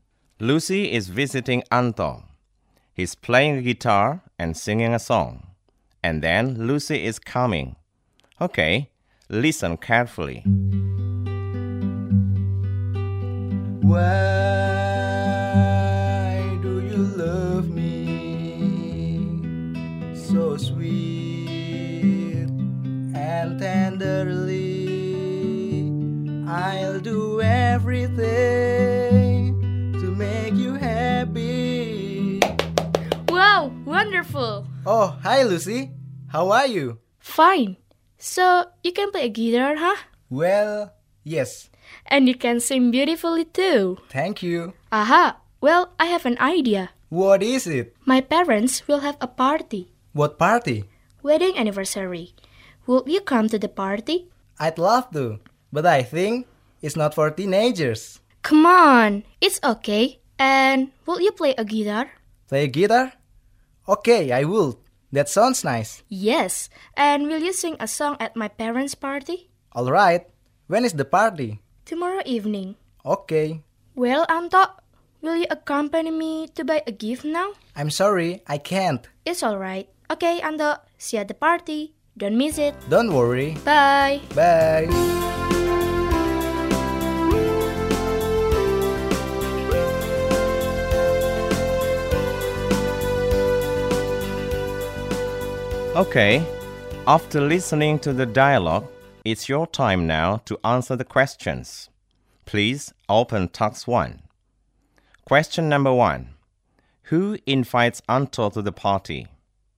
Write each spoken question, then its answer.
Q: Who invites Anto to the party?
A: Lucy, right.